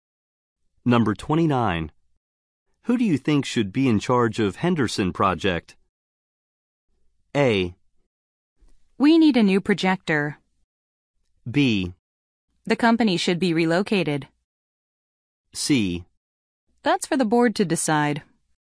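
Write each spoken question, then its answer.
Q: Who do you think should be in charge of Henderson Project?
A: C: That's for the board to decide.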